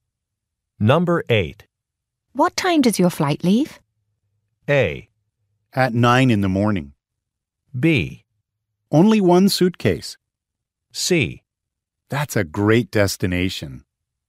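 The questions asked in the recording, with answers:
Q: What time does your flight leave?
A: A: At 9 in the morning.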